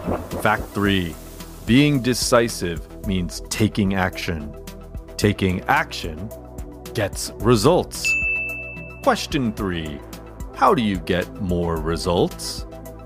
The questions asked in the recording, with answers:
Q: How do you get more results?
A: being decisive means taking action, and taking action gets results.